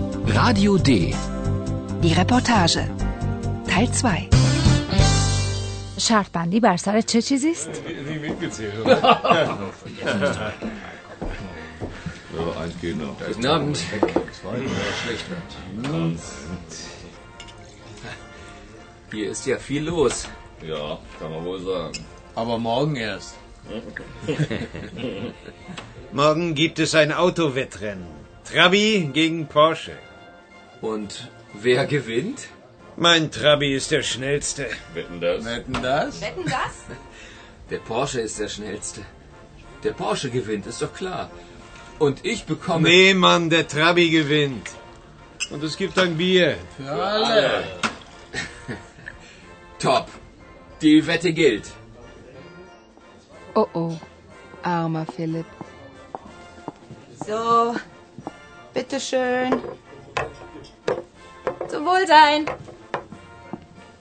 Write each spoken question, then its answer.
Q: شرط بر سر چه چیزی است؟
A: یک لیوان آبجو برای همه.